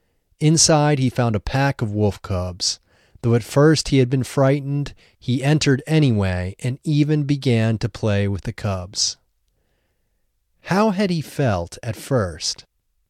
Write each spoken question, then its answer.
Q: How had he felt at first?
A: At first he had felt frightened.